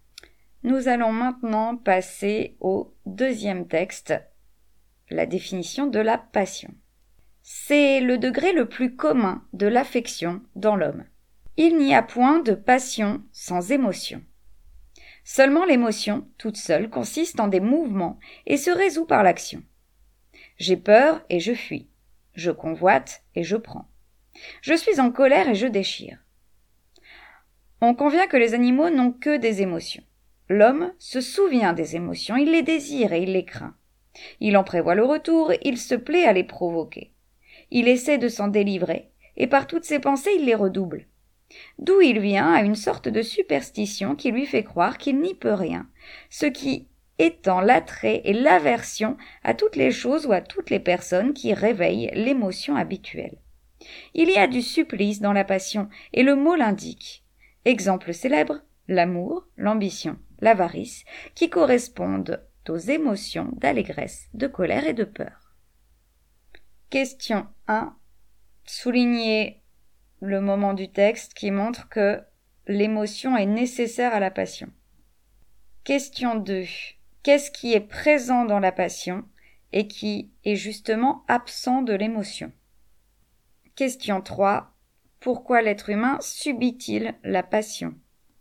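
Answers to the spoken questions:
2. La pensée : l'homme se souvient des émotions, les désire, les craint, en prévoit le retour
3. Par une sorte de superstition qui lui fait croire qu'il n'y peut rien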